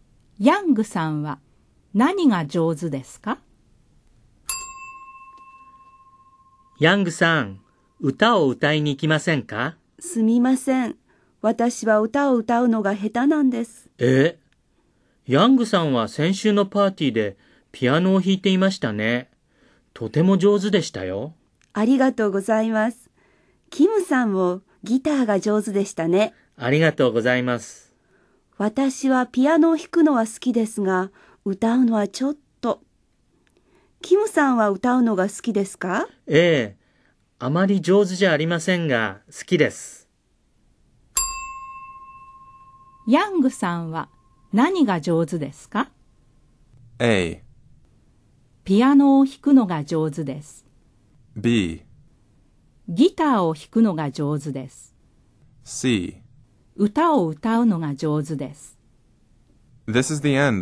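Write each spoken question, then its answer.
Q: ヤングさんは何が上手ですか?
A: A: ピアノを弾くのが上手です。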